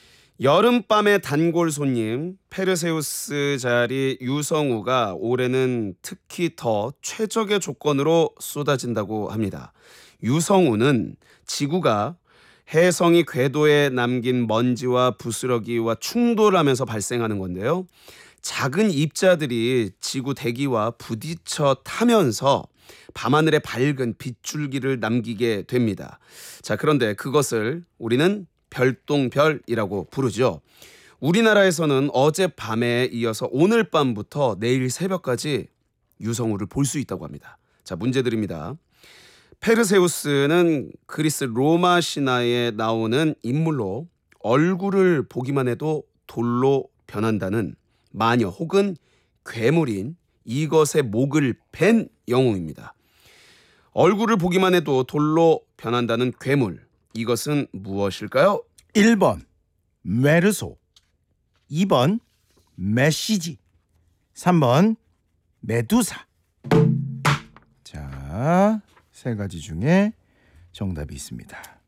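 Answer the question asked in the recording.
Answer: 3: 메두사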